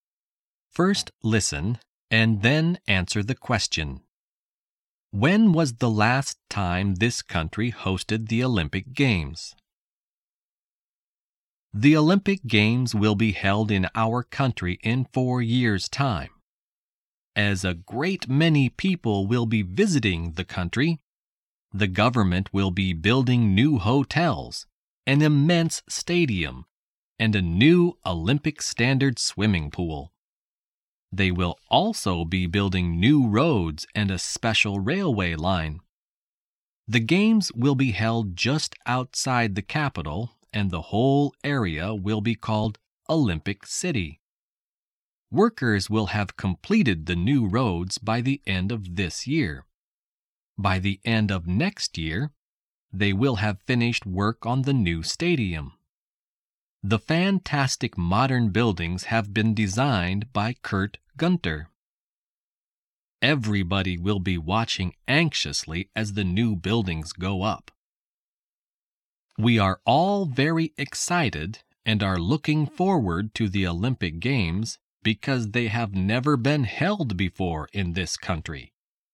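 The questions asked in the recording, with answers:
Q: When was the last time this country hosted the Olympic Games?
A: Never; the Olympic Games have never been held in this country before.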